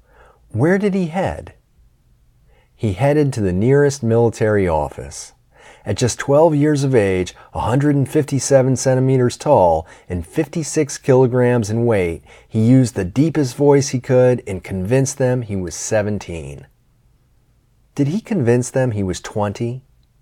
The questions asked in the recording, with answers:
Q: Did he convince them he was 20?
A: No, he didn't convince them he was 20.